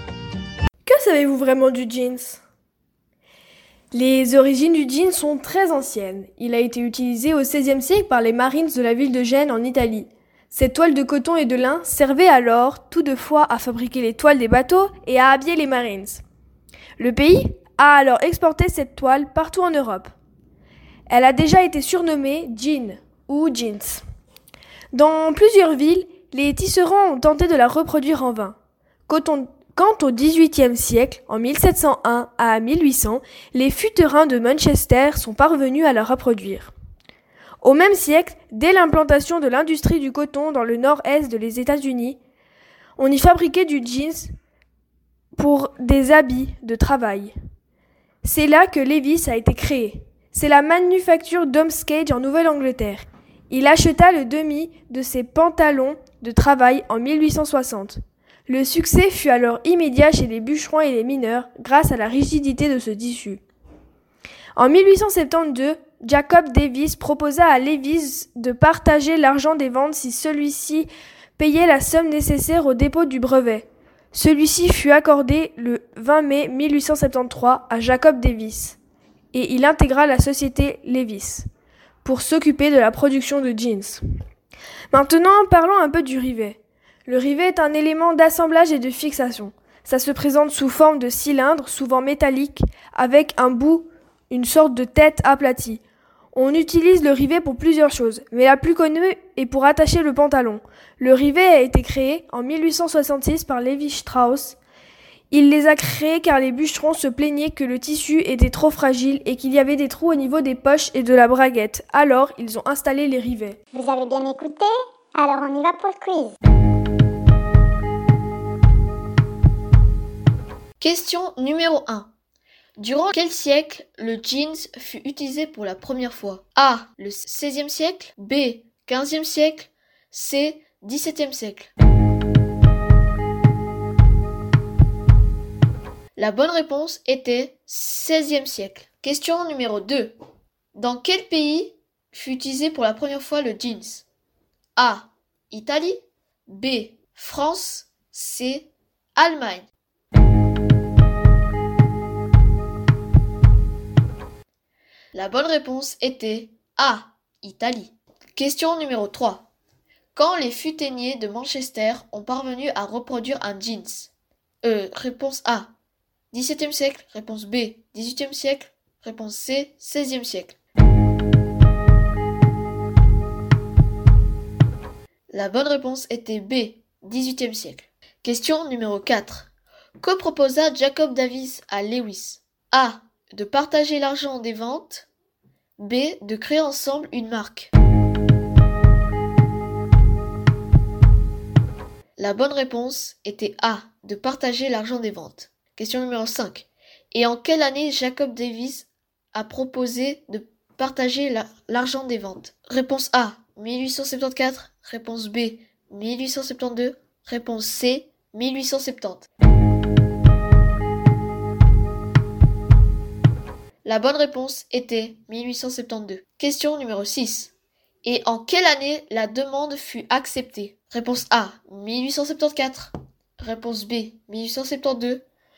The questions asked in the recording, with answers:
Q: Durant quel siècle le jeans fut utilisé pour la première fois?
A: La bonne réponse était 16e siècle.

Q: Quand les futainiers de Manchester ont parvenu à reproduire un jeans?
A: La bonne réponse était B.

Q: Et en quelle année la demande fut acceptée?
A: La bonne réponse était C.